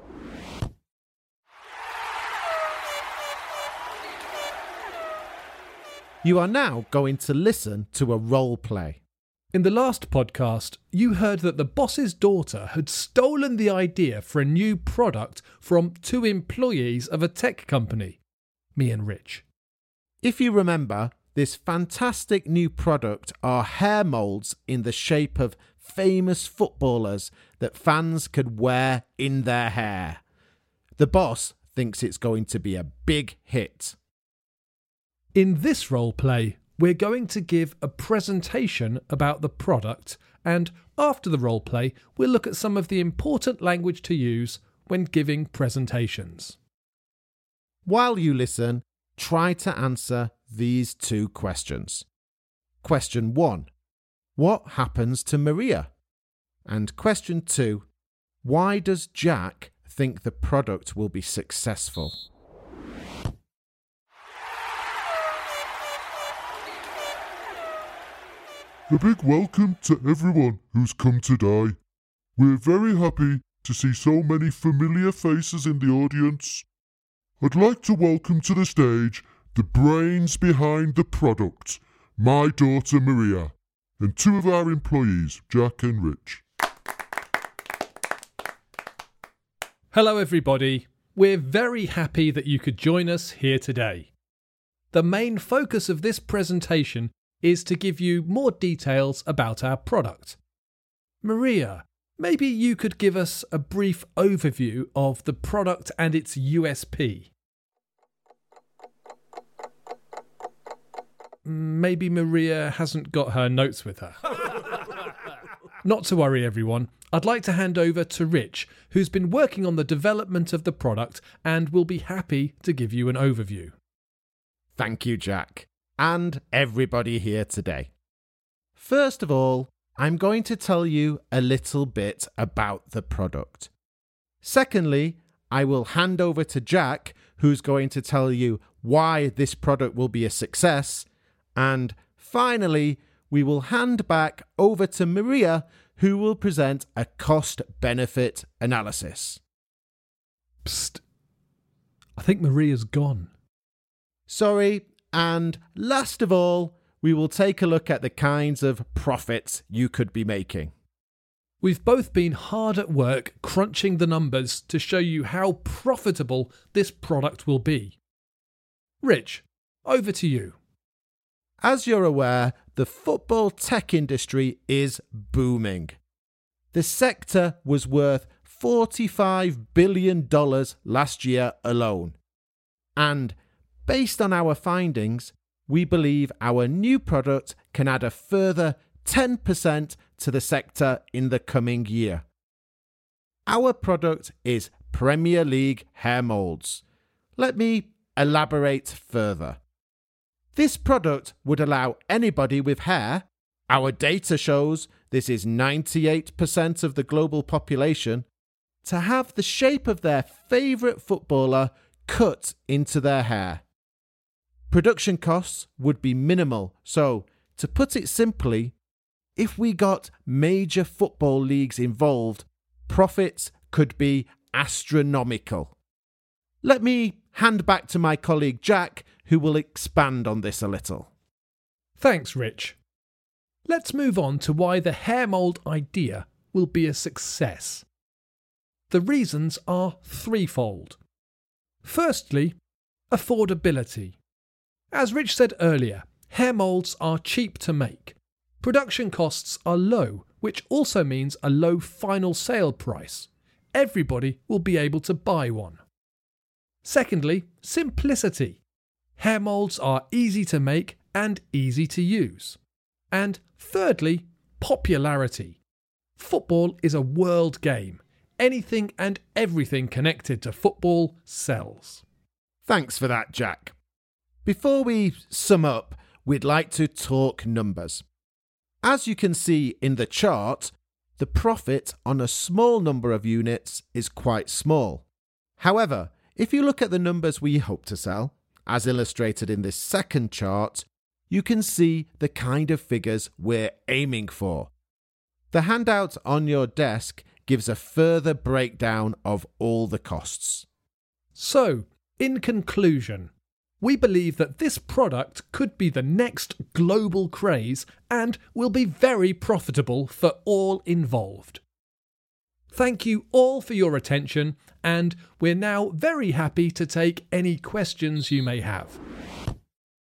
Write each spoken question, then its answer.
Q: Why does Jack think the product will be successful?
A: He gave three reasons: affordability, simplicity, and popularity.